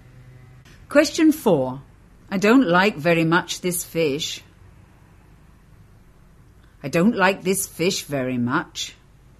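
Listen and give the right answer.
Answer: B: I don't like this fish very much.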